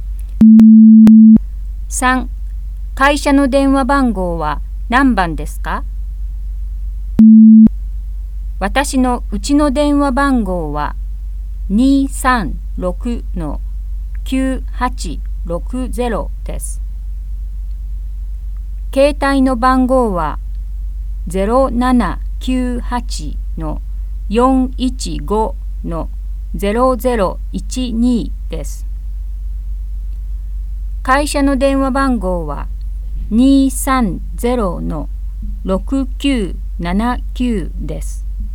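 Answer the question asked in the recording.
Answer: 230-6979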